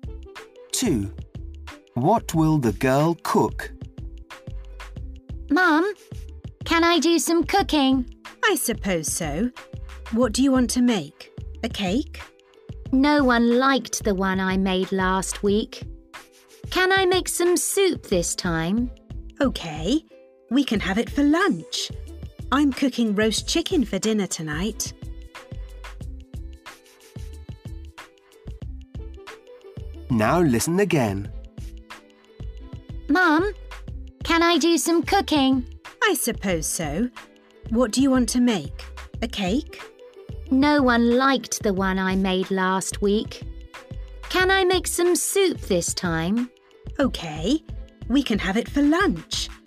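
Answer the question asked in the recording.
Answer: soup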